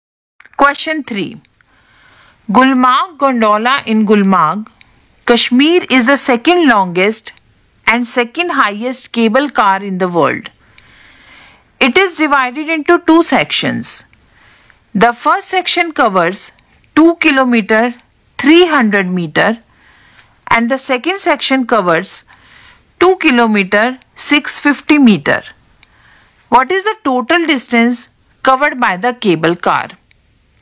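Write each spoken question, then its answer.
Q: What is the total distance covered by the cable car?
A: 4 km 950 m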